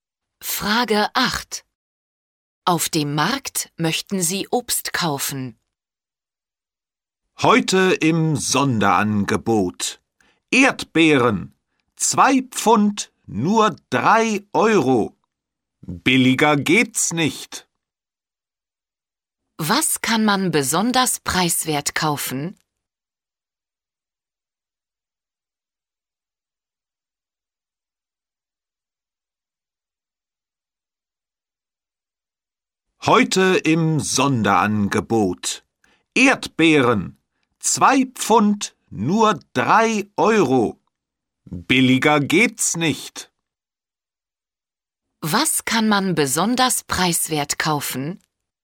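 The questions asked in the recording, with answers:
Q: Was kann man besonders preiswert kaufen?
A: Erdbeeren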